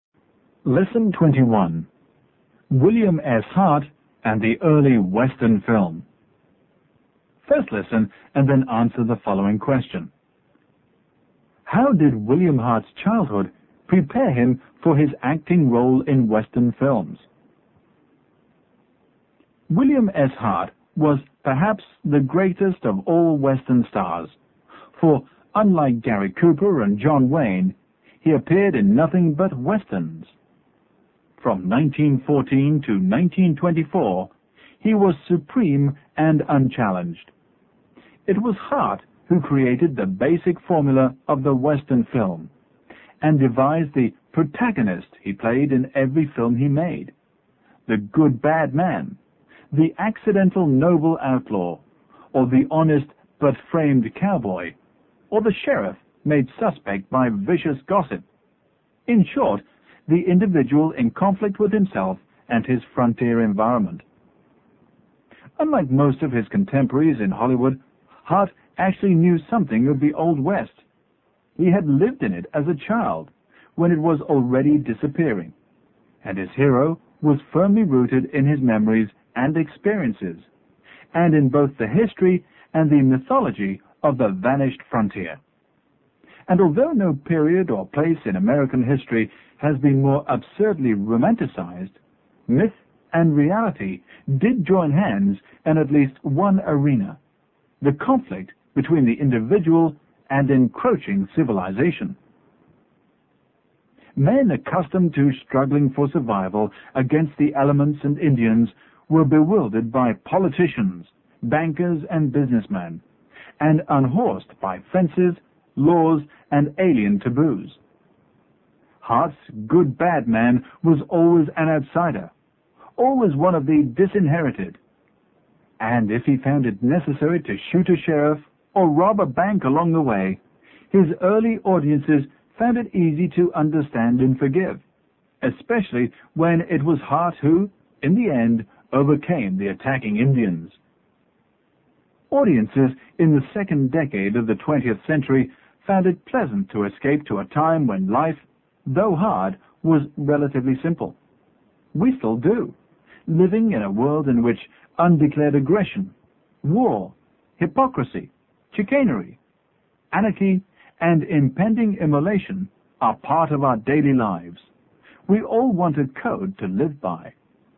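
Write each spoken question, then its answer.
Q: How did William Hart's childhood prepare him for his acting role in Western films?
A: He lived in the Old West as a child, so his hero was rooted in his own memories and experiences of the vanishing frontier.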